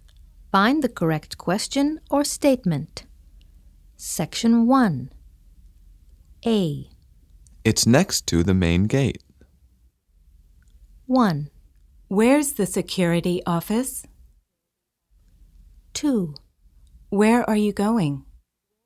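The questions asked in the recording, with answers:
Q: It's next to the main gate.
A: 1: Where's the security office?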